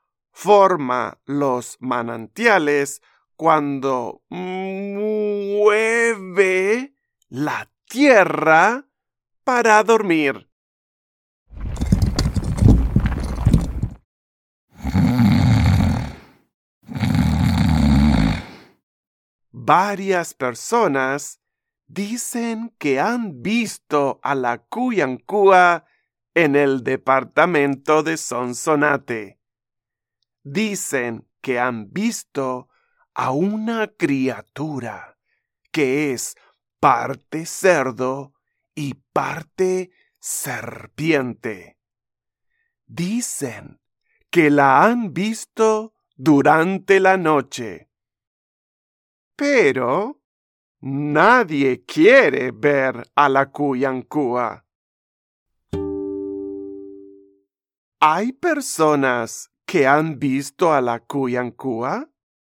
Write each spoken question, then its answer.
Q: ¿Hay personas que han visto a la Cuyancúa?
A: Sí, hay personas que dicen que han visto a la Cuyancúa